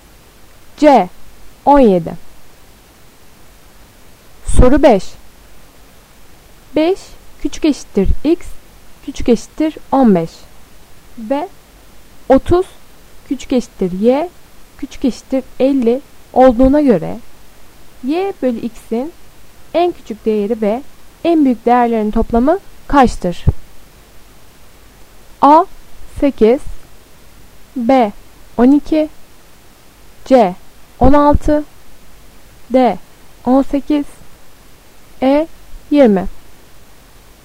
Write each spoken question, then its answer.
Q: 5 küçük eşittir x küçük eşittir 15 ve 30 küçük eşittir y küçük eşittir 50 olduğuna göre y bölü x'in en küçük değeri ve en büyük değerlerin toplamı kaçtır?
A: Doğru cevap B 12.